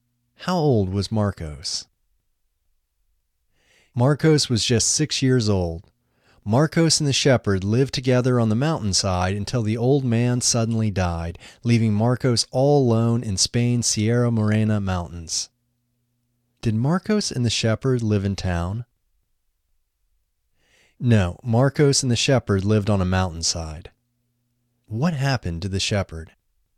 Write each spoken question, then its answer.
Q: What happened to the shepherd?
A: The shepherd suddenly died.